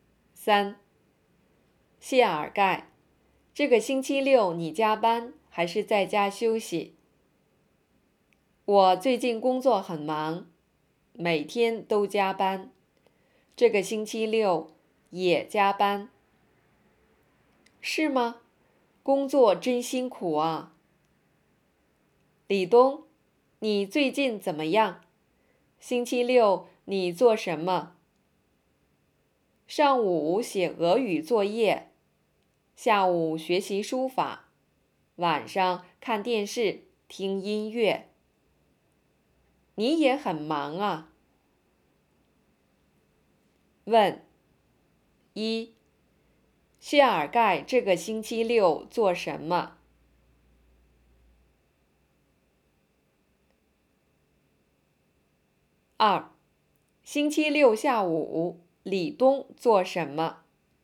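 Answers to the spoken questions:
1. 加班
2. 学习书法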